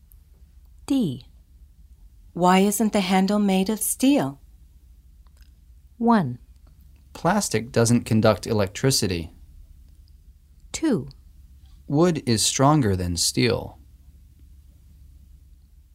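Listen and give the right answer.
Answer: 1: Plastic doesn't conduct electricity.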